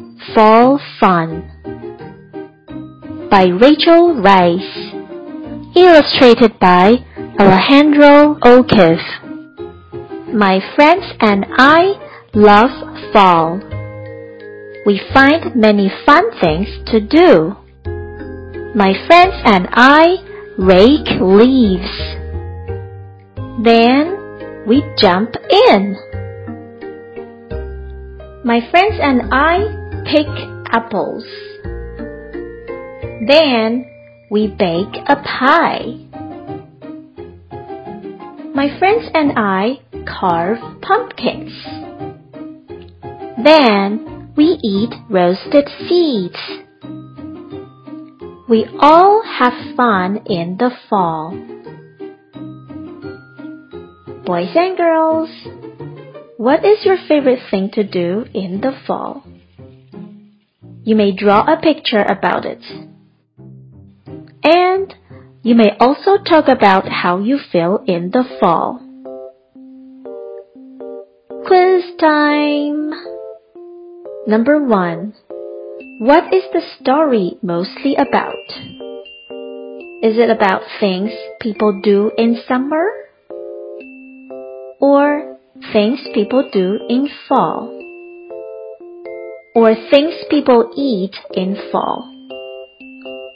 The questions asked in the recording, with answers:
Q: What is the story mostly about?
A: The answer is things people do in fall.